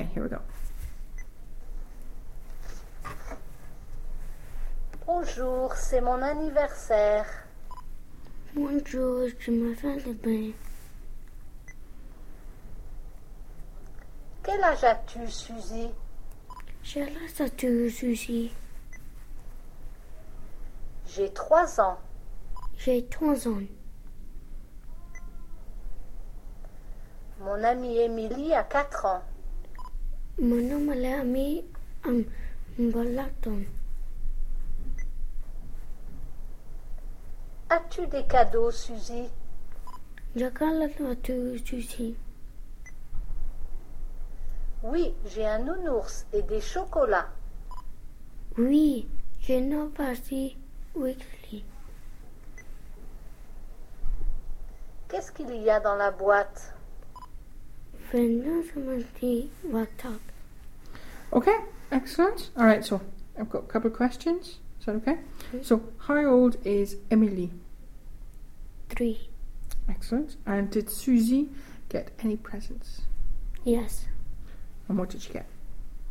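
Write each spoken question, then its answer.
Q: And did Suzy get any presents?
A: Yes.

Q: And what did she get?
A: A teddy bear and chocolates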